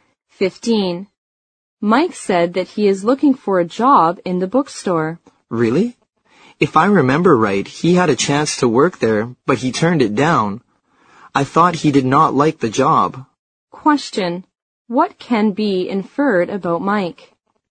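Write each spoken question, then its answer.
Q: What can be inferred about Mike?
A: He had a chance to work at the bookstore before but turned it down.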